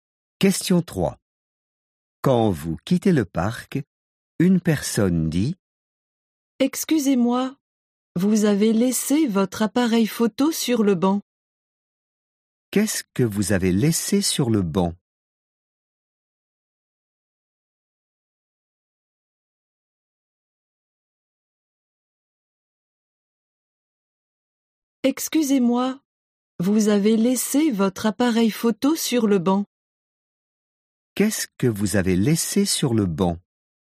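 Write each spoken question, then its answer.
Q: Qu'est-ce que vous avez laissé sur le banc?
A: Votre appareil photo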